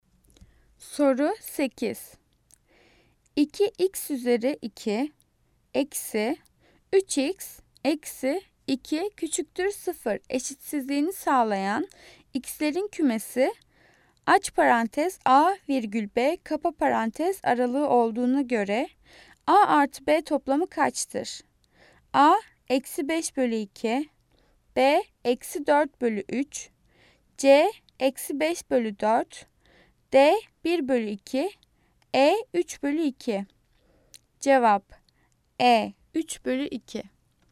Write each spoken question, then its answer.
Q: 2x üzeri 2 eksi 3x eksi 2 küçüktür 0 eşitsizliğini sağlayan x'lerin kümesi aç parantez a virgül b kapa parantez aralığı olduğuna göre a artı b toplamı kaçtır?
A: Cevap e 3 bölü 2.